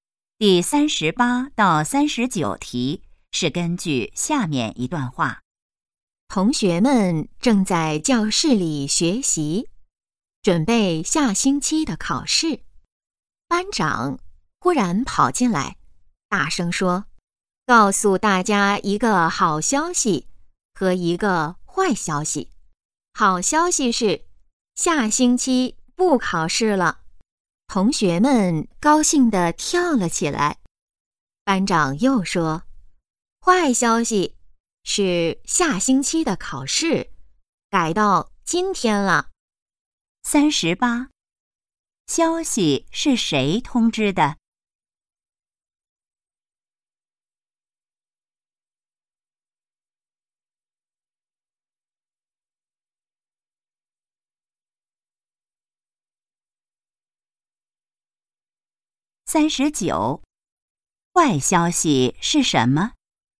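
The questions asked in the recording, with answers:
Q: 消息是谁通知的?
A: 班长

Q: 坏消息是什么?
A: 下星期的考试改到今天了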